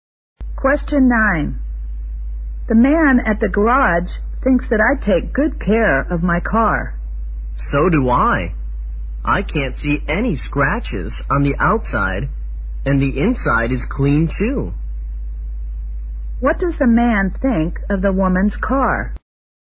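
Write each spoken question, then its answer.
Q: What does the man think of the woman's car?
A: It is well kept, with no scratches and a clean inside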